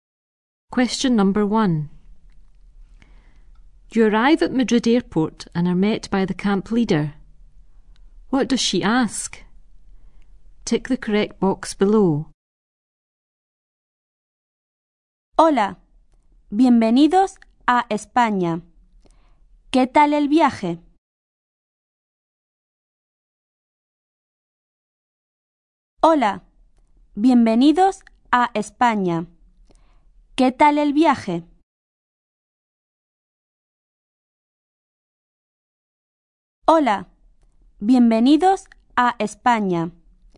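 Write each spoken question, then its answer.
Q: What does she ask?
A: How the journey was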